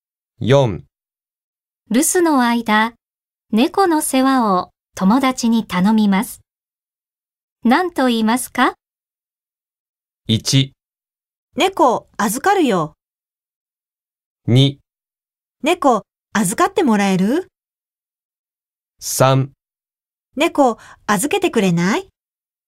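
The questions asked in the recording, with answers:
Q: 留守の間、猫の世話を友達に頼みます。何と言いますか?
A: 2: 猫預かってもらえる?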